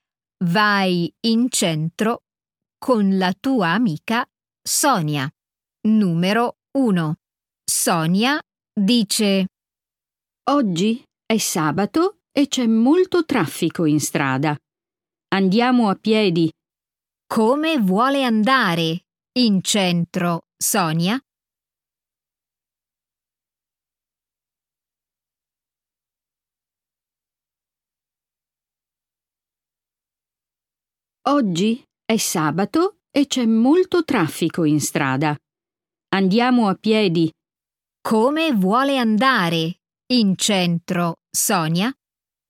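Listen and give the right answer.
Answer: a piedi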